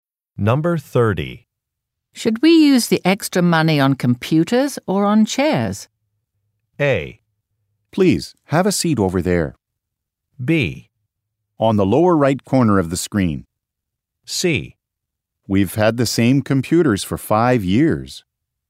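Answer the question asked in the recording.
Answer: C: We've had the same computers for 5 years.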